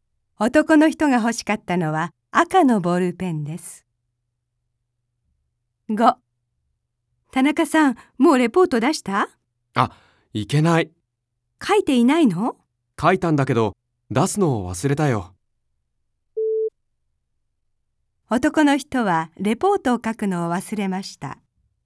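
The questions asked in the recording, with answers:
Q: 男の人はレポートを書くのを忘れました。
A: 正しくない(出すのを忘れた)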